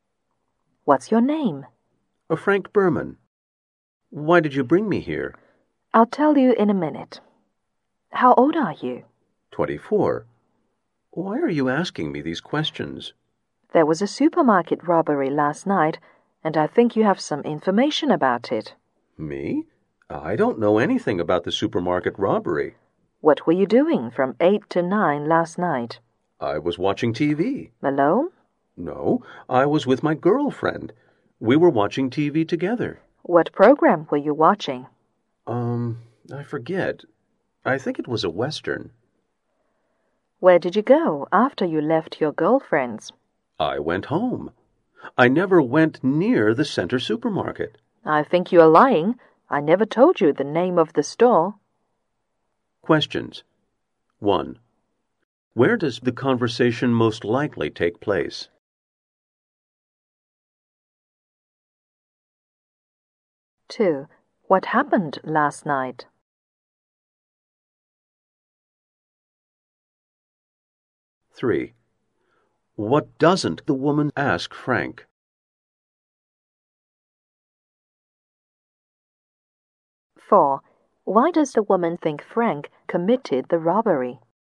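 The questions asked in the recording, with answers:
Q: What happened last night?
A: A supermarket was robbed

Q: Why does the woman think Frank committed the robbery?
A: He named the store though she never told him the name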